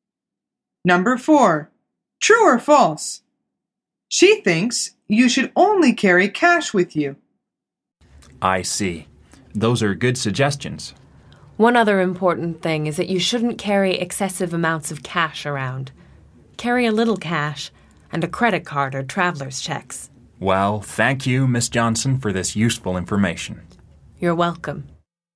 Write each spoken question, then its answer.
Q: True or false? She thinks you should only carry cash with you.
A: The answer is false. She says, carry a little cash and a credit card or traveler's checks.